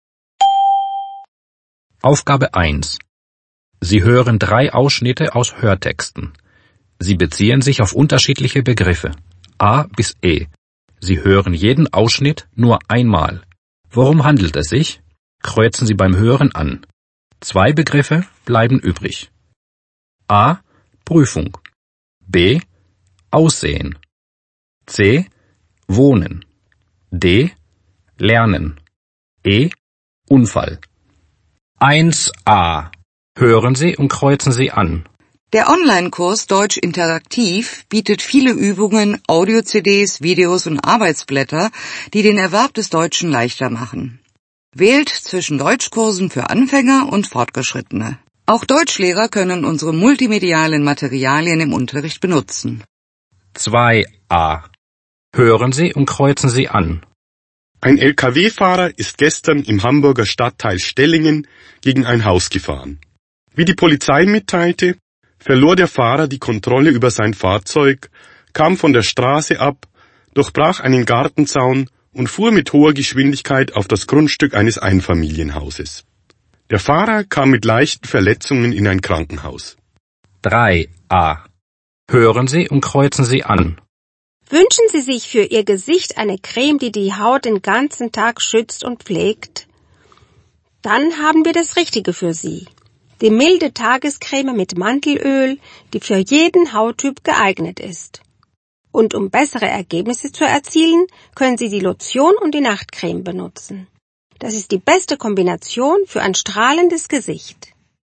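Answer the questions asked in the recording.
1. D: Lernen
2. E: Unfall
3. B: Aussehen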